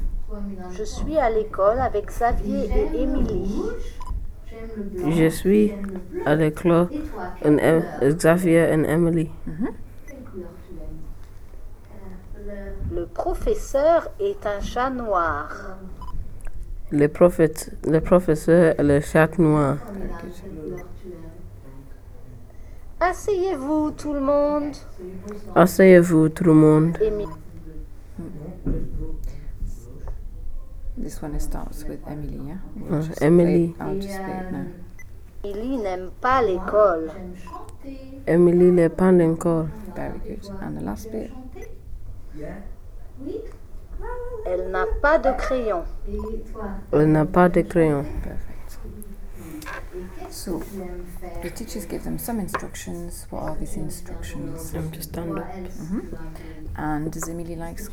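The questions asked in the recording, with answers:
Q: What are these instructions?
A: Sit down, everyone

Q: And does Emily like school?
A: No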